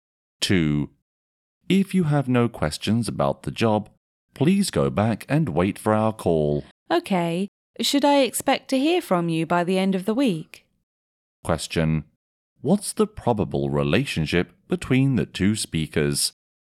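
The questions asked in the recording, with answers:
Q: What's the probable relationship between the two speakers?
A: Interviewer and job applicant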